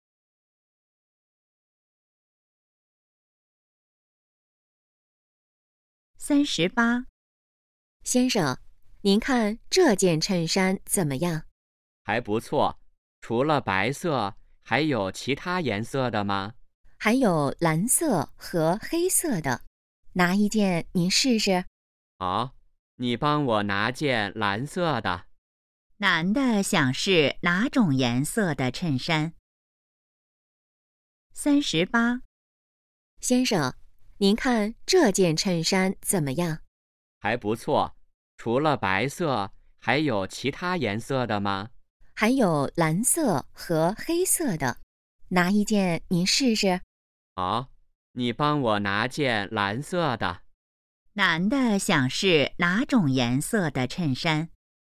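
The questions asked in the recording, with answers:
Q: 男的想试哪种颜色的衬衫?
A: 蓝色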